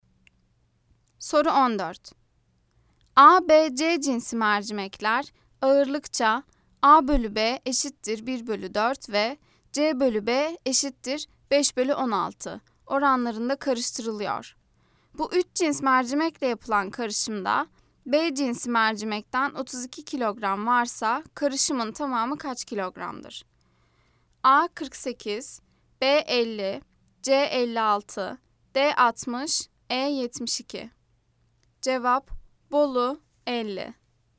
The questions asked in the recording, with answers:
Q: Bu 3 cins mercimekle yapılan karışımda B cinsi mercimekten 32 kilogram varsa karışımın tamamı kaç kilogramdır?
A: Cevap: Bolu 50.